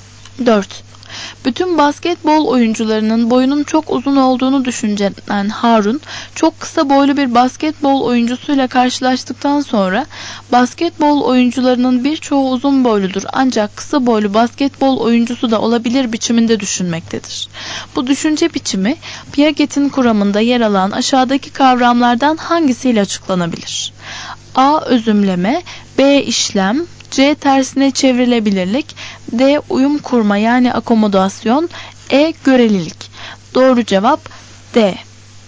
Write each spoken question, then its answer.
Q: Bu düşünce biçimi Piaget'in kuramında yer alan aşağıdaki kavramlardan hangisiyle açıklanabilir?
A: Doğru cevap D.